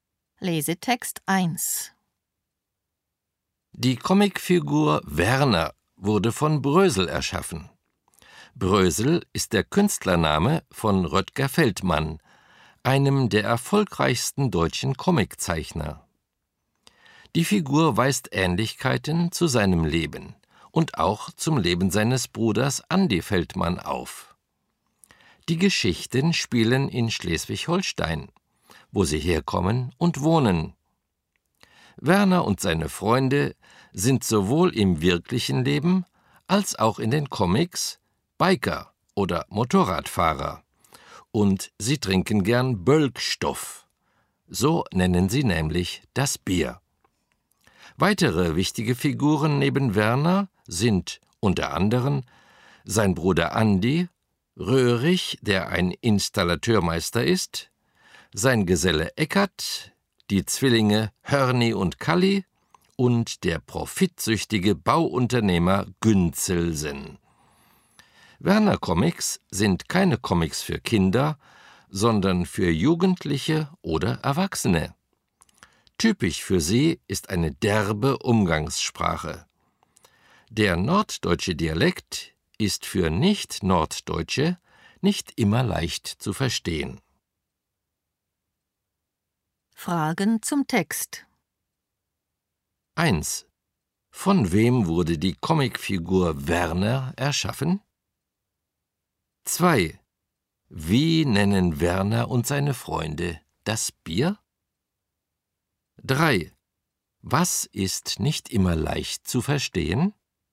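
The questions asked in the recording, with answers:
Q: Von wem wurde die Comicfigur Werner erschaffen?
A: Von Brösel (Röttger Feldmann)

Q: Wie nennen Werner und seine Freunde das Bier?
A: Bölkstoff

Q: Was ist nicht immer leicht zu verstehen?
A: Der norddeutsche Dialekt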